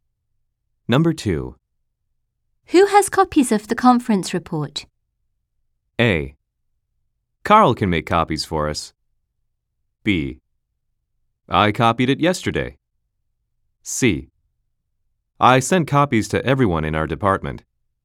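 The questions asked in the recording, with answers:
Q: Who has copies of the conference report?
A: C: I sent copies to everyone in our department.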